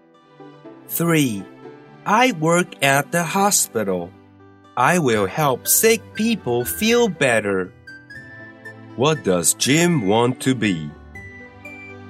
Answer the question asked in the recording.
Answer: He wants to be a doctor.